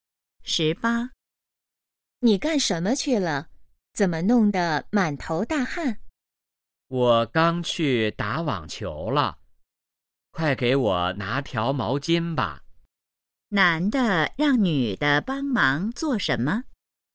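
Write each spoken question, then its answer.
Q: 男的让女的帮忙做什么?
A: 拿毛巾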